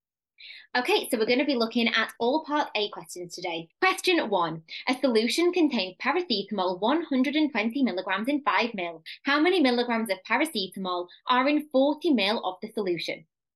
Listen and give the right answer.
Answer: 120 milligrams times by 8, which equals 960 milligrams